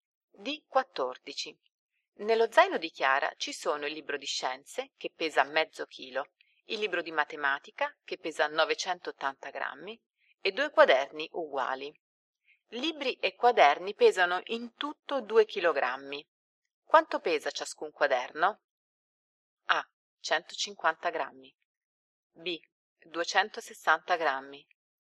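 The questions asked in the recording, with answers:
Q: Quanto pesa ciascun quaderno?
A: B: 260 grammi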